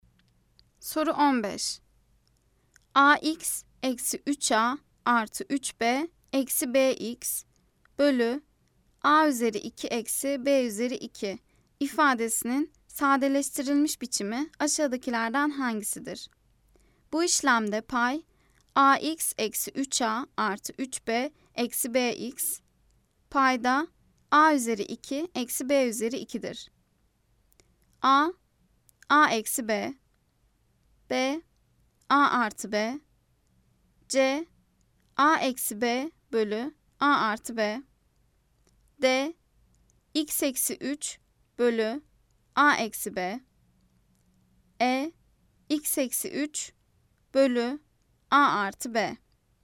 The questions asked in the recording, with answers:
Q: AX eksi 3A artı 3B eksi BX bölü A üzeri 2 eksi B üzeri 2 ifadesinin sadeleştirilmiş biçimi aşağıdakilerden hangisidir?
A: Cevap, Edirne, X eksi 3 bölü A artı B.